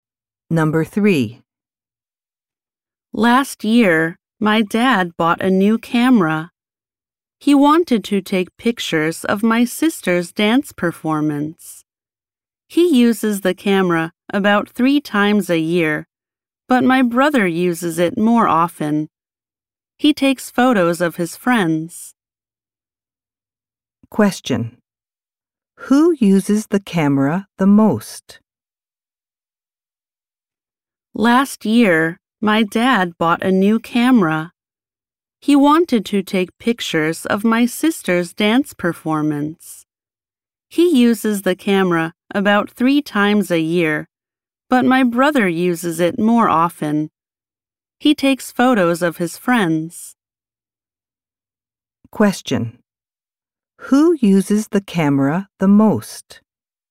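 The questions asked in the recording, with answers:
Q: Who uses the camera the most?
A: The speaker's brother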